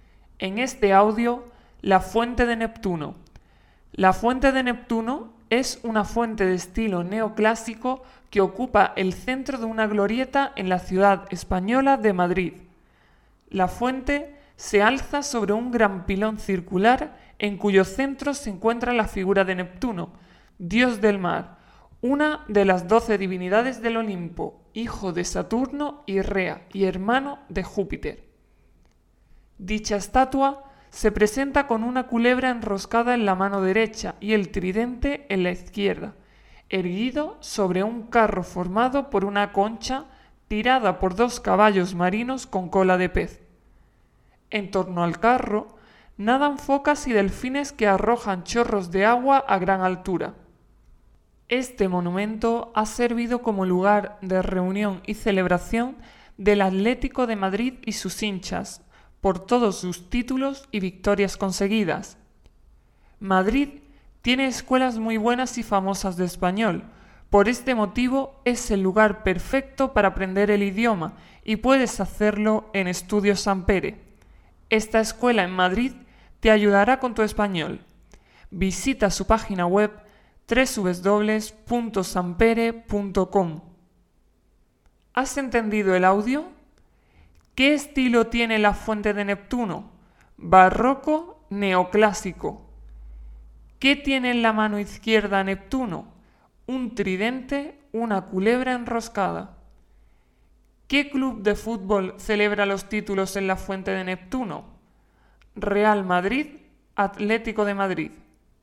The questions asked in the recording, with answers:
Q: ¿Qué estilo tiene la fuente de Neptuno?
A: Neoclásico

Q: ¿Qué tiene en la mano izquierda Neptuno?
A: un tridente

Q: ¿Qué club de fútbol celebra los títulos en la fuente de Neptuno?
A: Atlético de Madrid